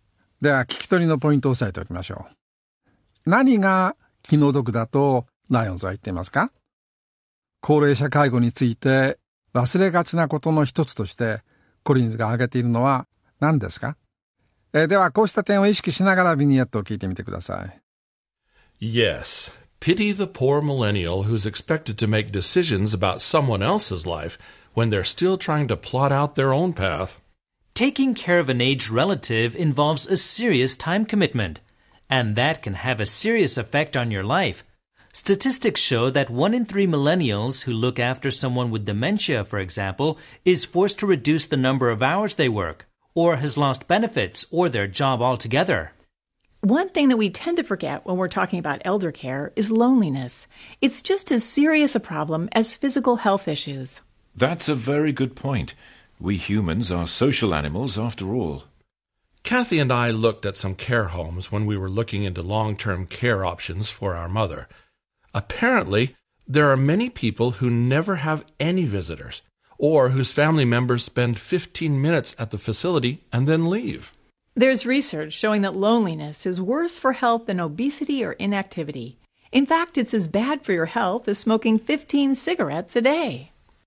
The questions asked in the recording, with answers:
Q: 何が気の毒だとライオンズは言っていますか?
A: ライオンズが気の毒だと言っていたのは、ミレニアル世代の人たちは自分自身の道をこれから決断しようとしているときに、他の人の人生についての決断を求められているということでしたね。

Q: 高齢者介護について忘れがちなことの一つとしてコリンズが挙げているのは何ですか?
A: 高齢者介護について忘れがちなことの一つとしてコリンズが挙げていたのは孤独感、ロンリネスということでした。